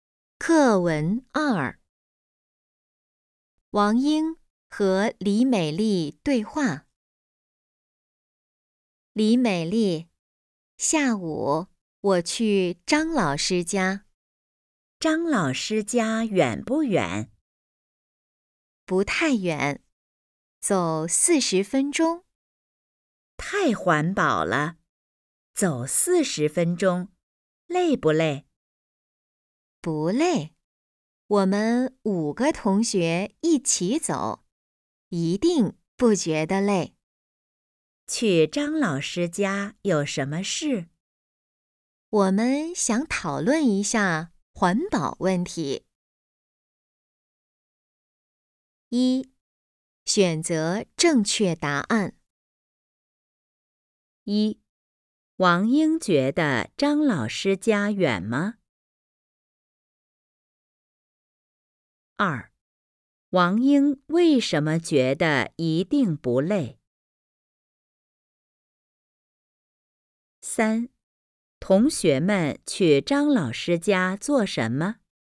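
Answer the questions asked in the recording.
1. 不太远,走40分钟
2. 因为5个同学一起走
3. 讨论环保问题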